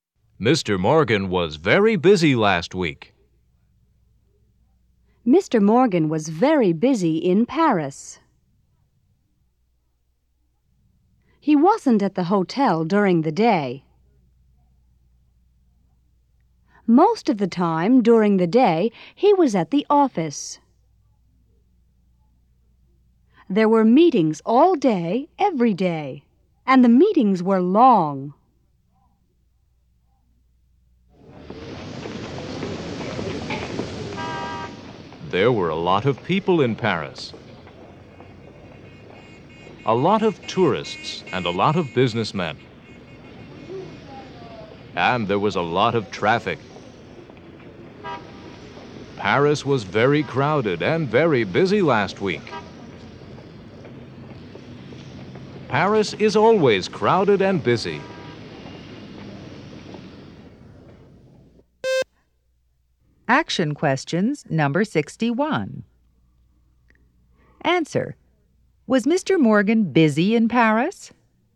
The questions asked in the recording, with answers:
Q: Was Mr. Morgan busy in Paris?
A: Yes, he was.